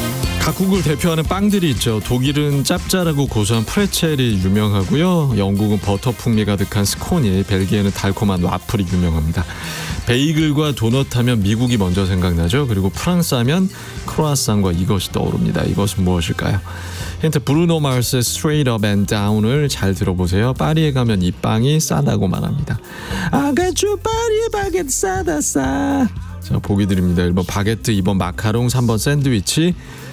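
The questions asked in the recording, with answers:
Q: 이것은 무엇일까요?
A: 1번: 바게트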